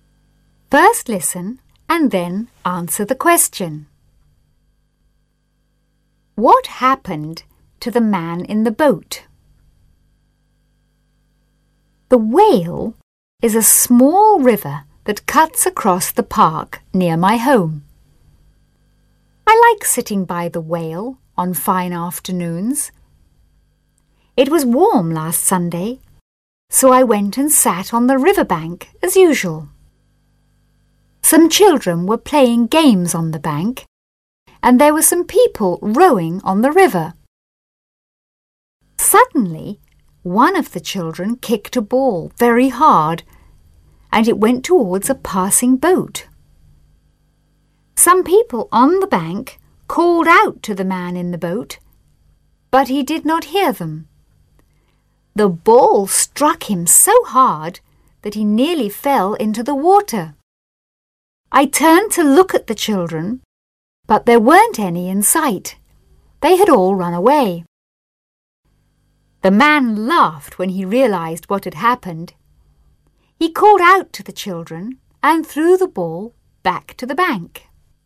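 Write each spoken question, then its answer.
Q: What happened to the man in the boat?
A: A ball kicked by a child struck him so hard that he nearly fell into the water.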